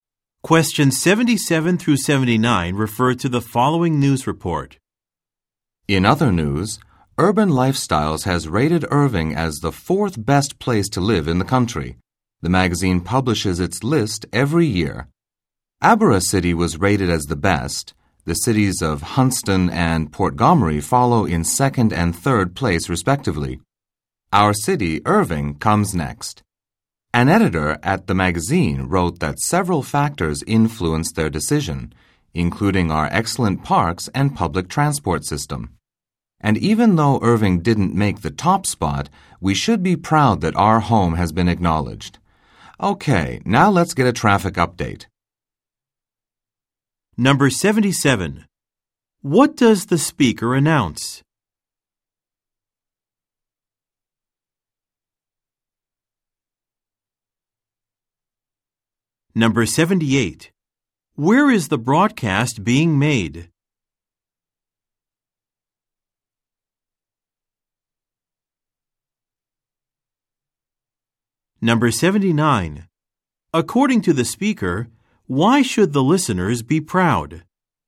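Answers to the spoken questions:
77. A magazine rated Irving the fourth best place to live in the country
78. In Irving
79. Their city has been acknowledged as one of the best places to live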